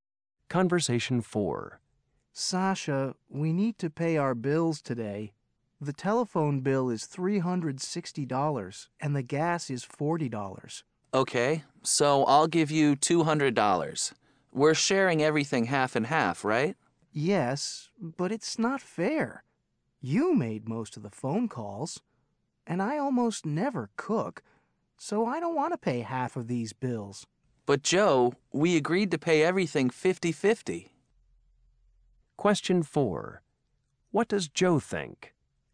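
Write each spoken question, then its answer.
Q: What does Joe think?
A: Sasha should pay more than half because she made most of the calls and cooks more.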